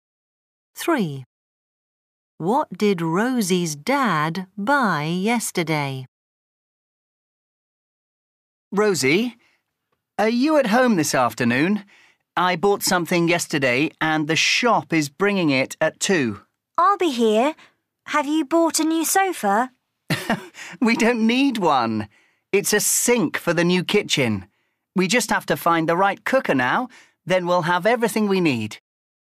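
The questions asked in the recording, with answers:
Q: What did Rosie's dad buy yesterday?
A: A sink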